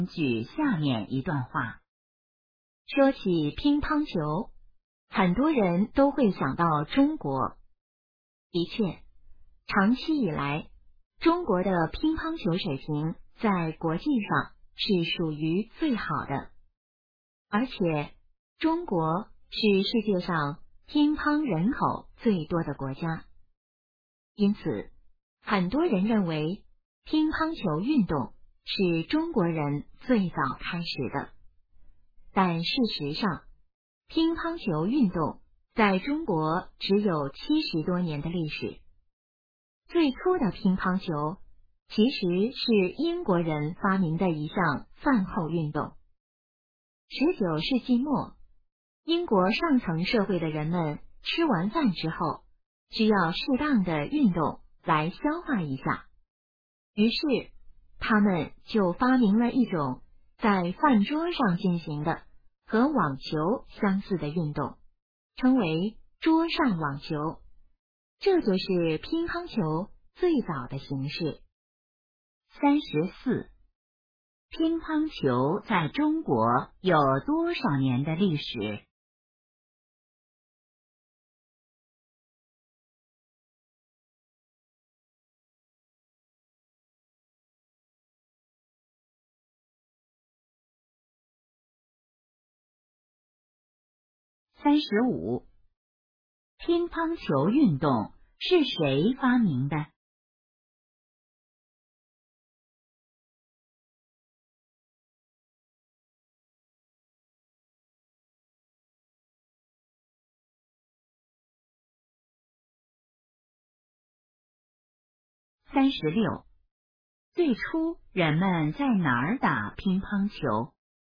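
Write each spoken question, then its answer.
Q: 乒乓球在中国有多少年的历史?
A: 70多年

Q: 乒乓球运动是谁发明的?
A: 英国人

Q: 最初人们在哪儿打乒乓球?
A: 在饭桌上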